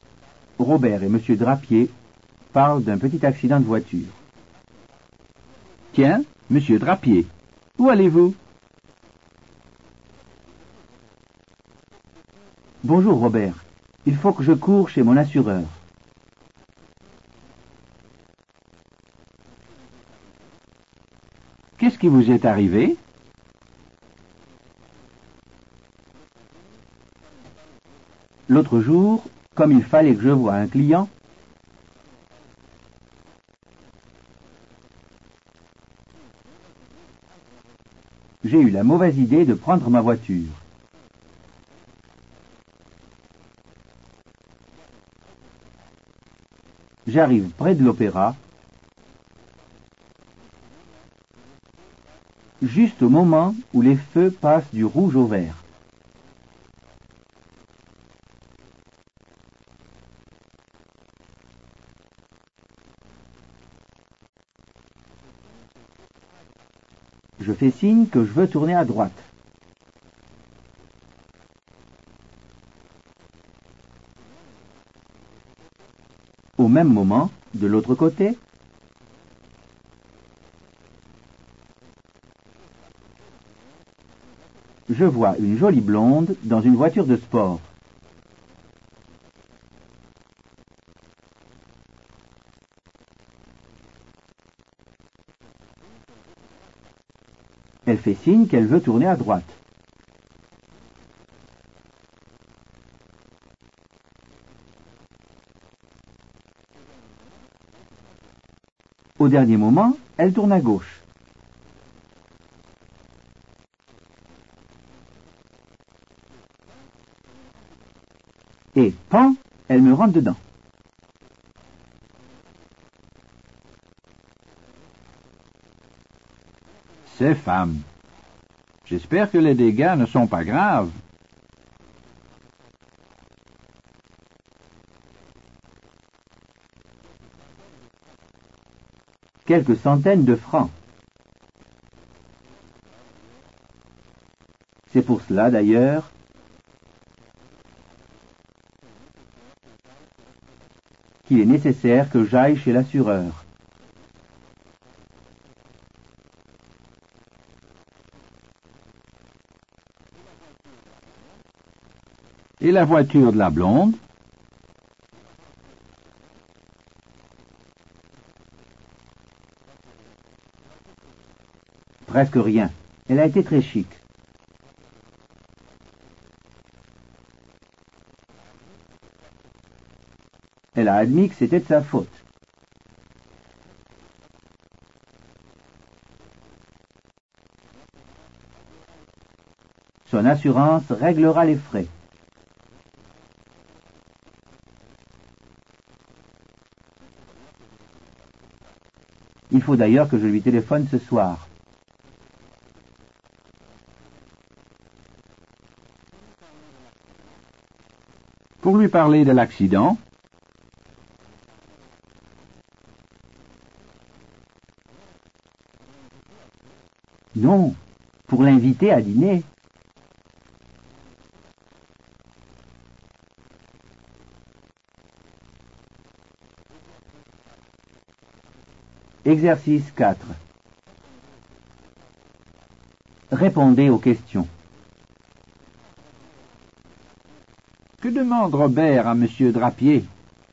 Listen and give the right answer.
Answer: Il lui demande où il va.